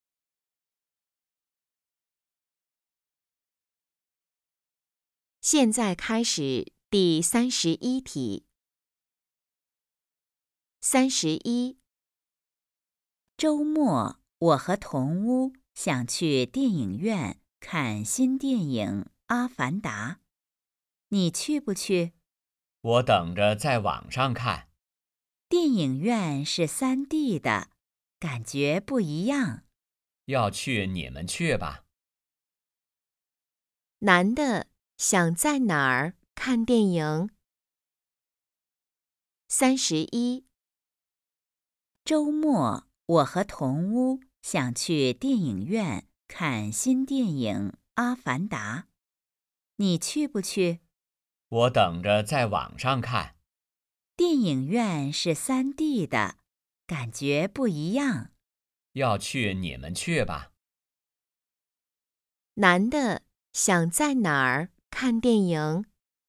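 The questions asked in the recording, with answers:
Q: 男的想在哪儿看电影?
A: 网上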